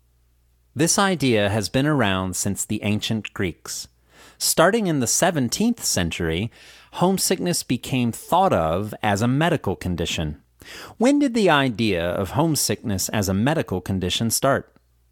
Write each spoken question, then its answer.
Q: When did the idea of homesickness as a medical condition start?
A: The idea of homesickness as a medical condition started in the 17th century.